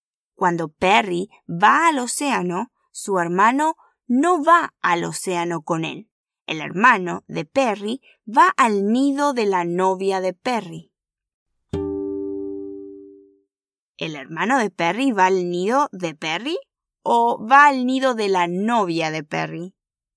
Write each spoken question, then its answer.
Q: ¿El hermano de Perry va al nido de Perry? ¿O va al nido de la novia de Perry?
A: Sí, el hermano de Perry va al nido de la novia de Perry.